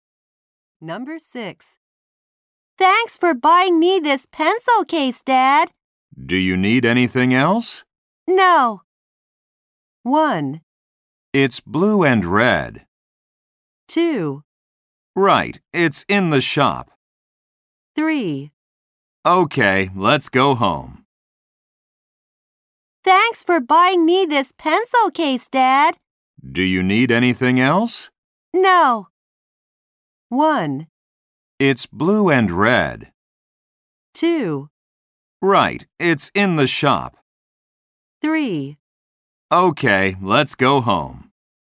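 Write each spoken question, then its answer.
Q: Do you need anything else?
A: 3: Okay, let's go home.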